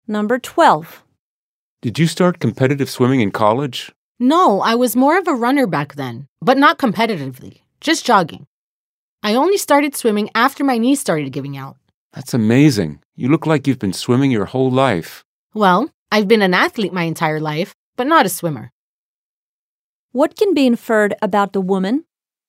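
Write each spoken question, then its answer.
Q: What can be inferred about the woman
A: She took up swimming only later, after her knees started giving out; she was not a swimmer in college.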